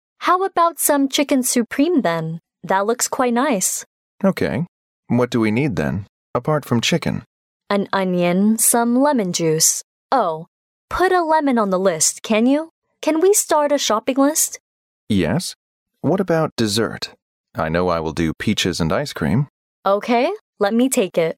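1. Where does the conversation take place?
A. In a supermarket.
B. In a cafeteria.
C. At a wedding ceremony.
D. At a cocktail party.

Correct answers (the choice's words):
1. In a supermarket.

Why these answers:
对话中双方主要就需要买什么食材展开讨论,其中女士问男士要不要买点鸡肉,随后指出还需要洋葱、柠檬汁,并提出把柠檬纳入购物单,由此可推知对话发生在一家超市里。

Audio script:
W: How about some chicken supreme, then? That looks quite nice.
M: OK. What do we need then, apart from chicken?
W: An onion, some lemon juice—oh, put a lemon on the list, can you? Can we start a shopping list?
M: Yes, what about dessert? I know I will do peaches and ice cream.
W: OK. Let me take it.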